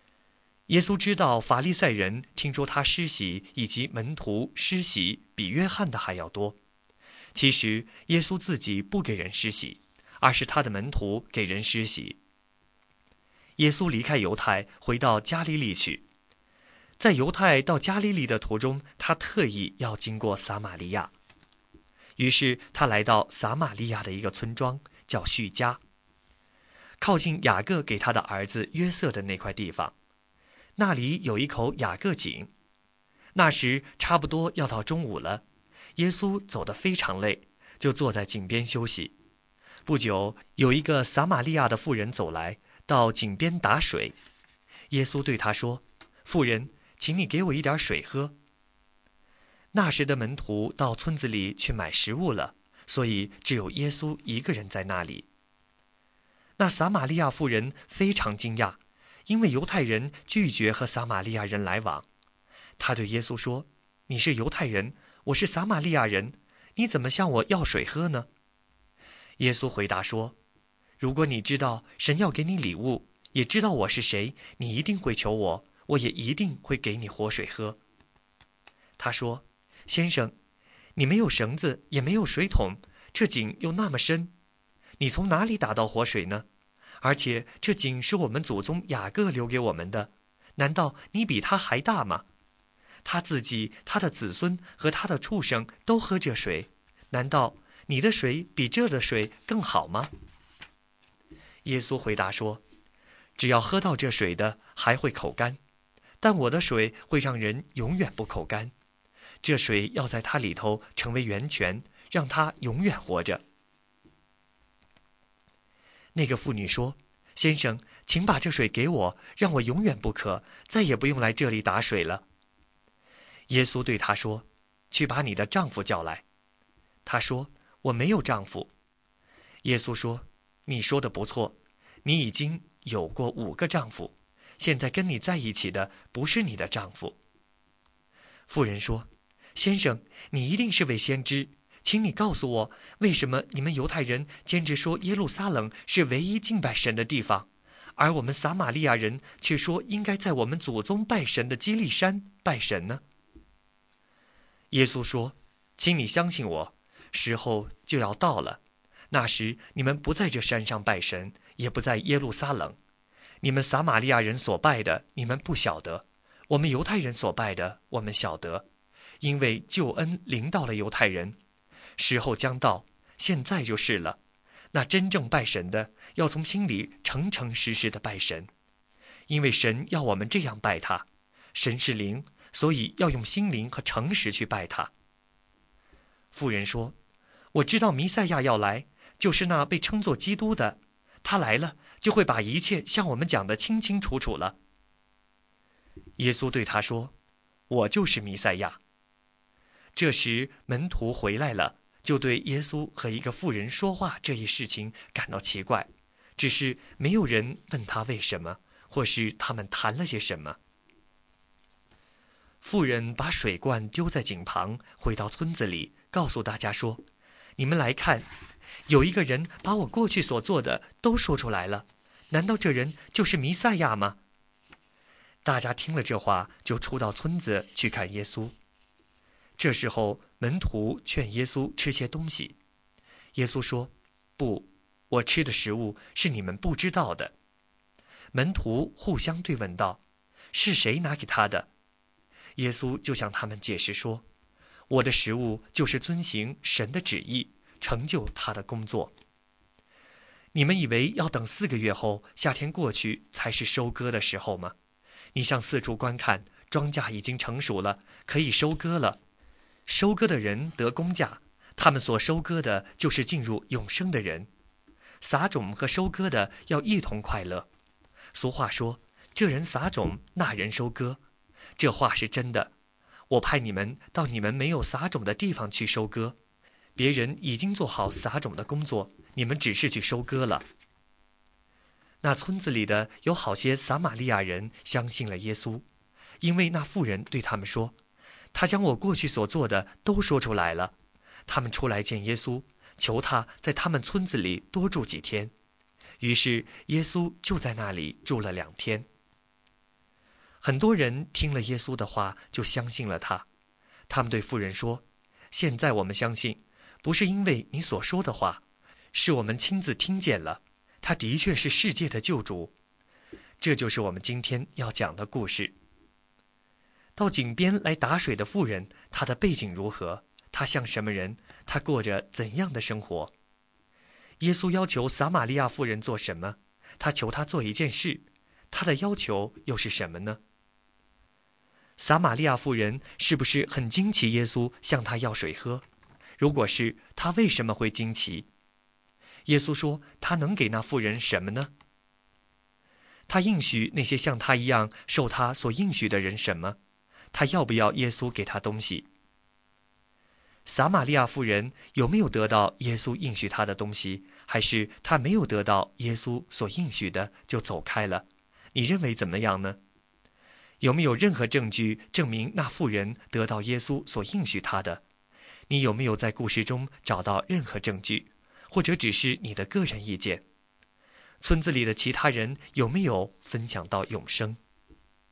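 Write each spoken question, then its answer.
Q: 耶稣要求撒玛利亚妇人做什么?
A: 给他一点水喝

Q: 撒玛利亚妇人是不是很惊奇耶稣向她要水喝?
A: 是,因为犹太人拒绝和撒玛利亚人来往

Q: 耶稣说,她能给那妇人什么呢?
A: 活水(让人永远不渴、得永生的水)

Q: 他要不要耶稣给他东西?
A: 要,她说:先生,请把这水给我

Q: 村子里的其他人有没有分享到永生?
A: 有,很多撒玛利亚人相信了耶稣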